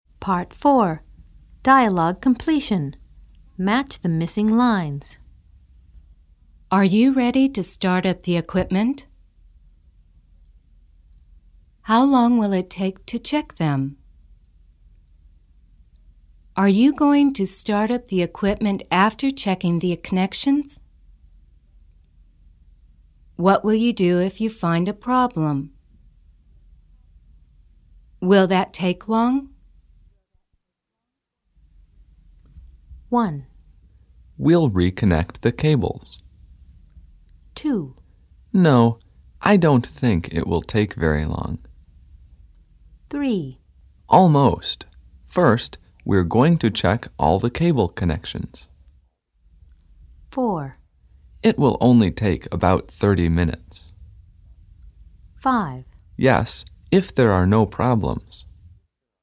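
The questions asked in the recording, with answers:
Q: Are you ready to start up the equipment?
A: 3: Almost. First, we're going to check all the cable connections.

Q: How long will it take to check them?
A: 4: It will only take about 30 minutes.

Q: Are you going to start up the equipment after checking the connections?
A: 5: Yes, if there are no problems.

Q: What will you do if you find a problem?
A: 1: We'll reconnect the cables.

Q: Will that take long?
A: 2: No, I don't think it will take very long.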